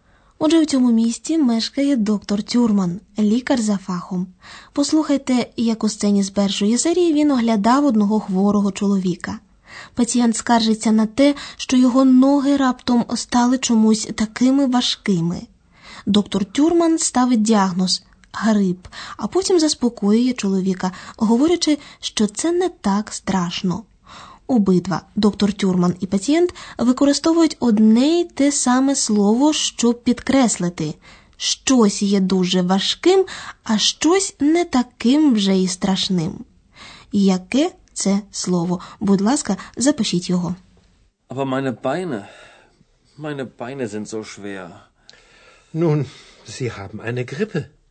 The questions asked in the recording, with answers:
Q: Яке це слово?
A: правильною відповіддю на останнє запитання буде маленьке слово зо.